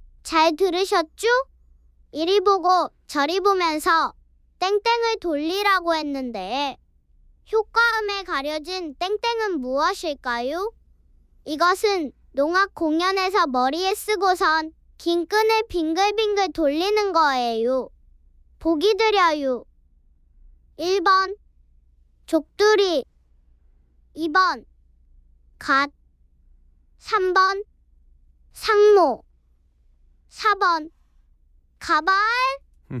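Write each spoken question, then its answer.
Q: 이리 보고 저리 보면서 땡땡을 돌리라고 했는데 효과음에 가려진 땡땡은 무엇일까요?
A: 3번: 상모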